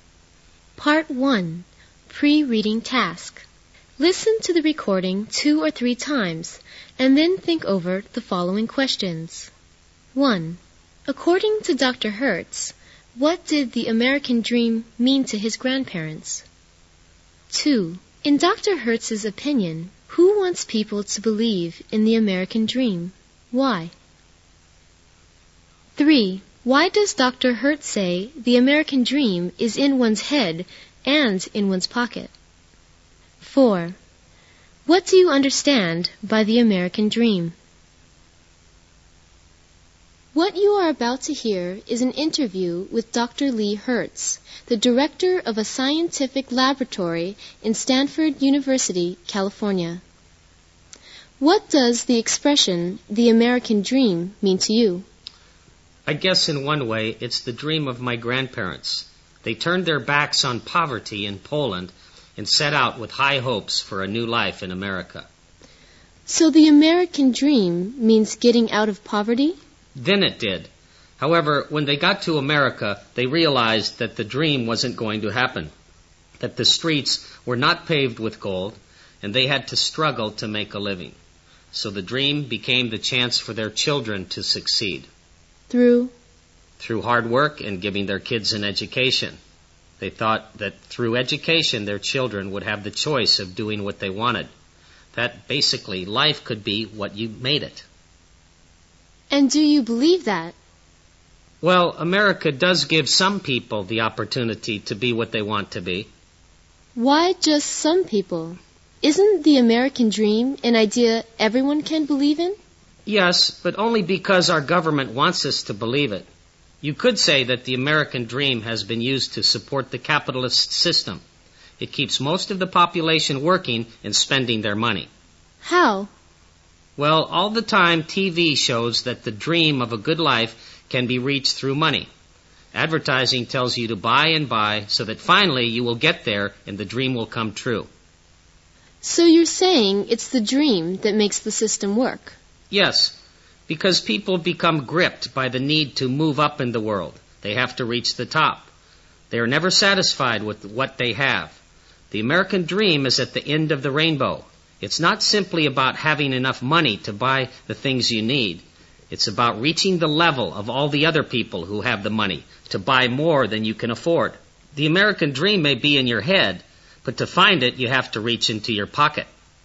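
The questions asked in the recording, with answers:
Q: According to Dr. Hertz, what did the American Dream mean to his grandparents?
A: Getting out of poverty and starting a new life in America; then the chance for their children to succeed through hard work and education

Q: In Dr. Hertz's opinion, who wants people to believe in the American Dream?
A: The government, because the dream supports the capitalist system by keeping people working and spending their money

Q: Why does Dr. Hertz say the American Dream is in one's head and in one's pocket?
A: Because it is an idea, but you can only reach it by spending money to reach the level of people who can buy more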